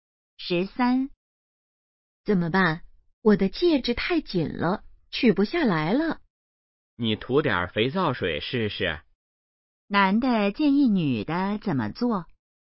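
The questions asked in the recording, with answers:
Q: 男的建议女的怎么做?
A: 涂点肥皂水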